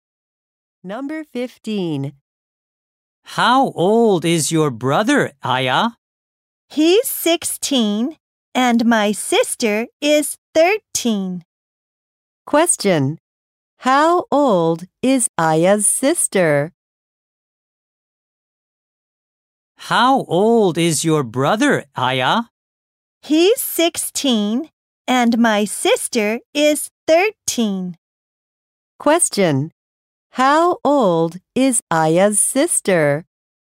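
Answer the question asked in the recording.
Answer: 13 years old.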